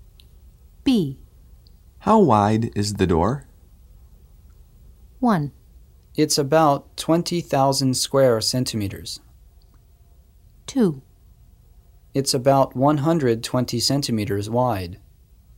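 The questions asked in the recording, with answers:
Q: How wide is the door?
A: 2: It's about 120 centimeters wide.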